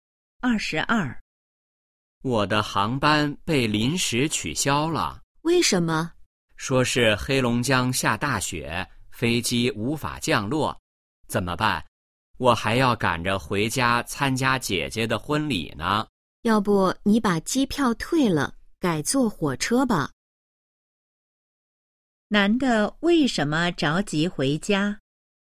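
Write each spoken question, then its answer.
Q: 男的为什么着急回家?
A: 要参加姐姐的婚礼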